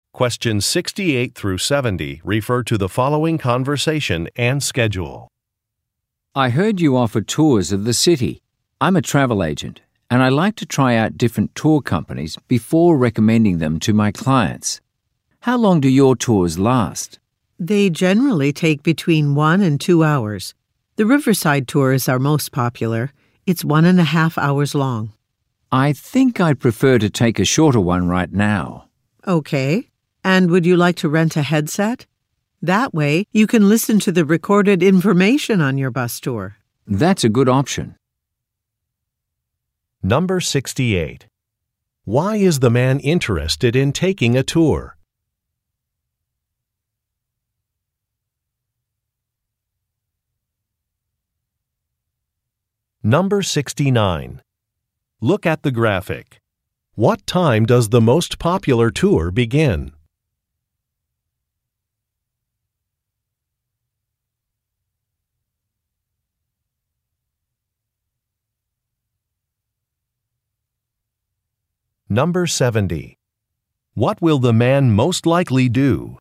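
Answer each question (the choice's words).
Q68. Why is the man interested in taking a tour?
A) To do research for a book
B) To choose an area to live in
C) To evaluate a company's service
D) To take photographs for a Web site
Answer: To evaluate a company's service

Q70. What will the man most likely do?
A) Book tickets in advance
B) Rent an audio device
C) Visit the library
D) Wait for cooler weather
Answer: Rent an audio device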